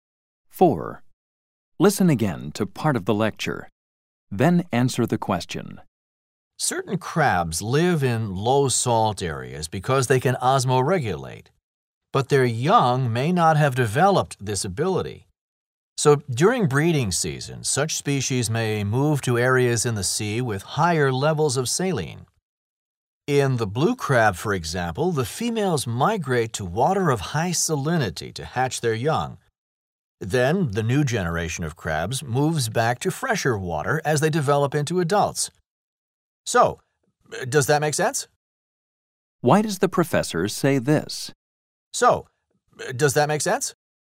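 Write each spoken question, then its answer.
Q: Why does the professor say this?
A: To check that the students understand the explanation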